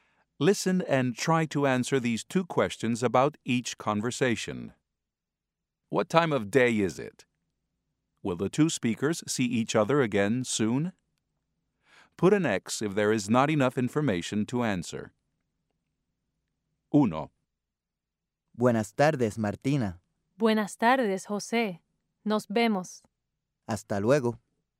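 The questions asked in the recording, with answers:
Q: What time of day is it?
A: Afternoon

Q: Will the two speakers see each other again soon?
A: Yes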